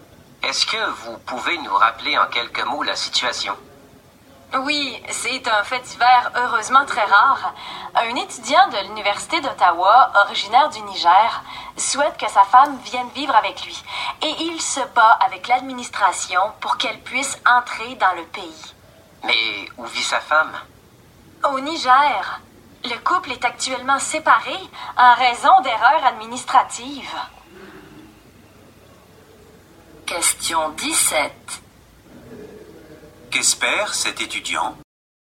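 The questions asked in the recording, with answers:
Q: Qu'espère cet étudiant?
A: Que sa femme puisse venir vivre avec lui au Canada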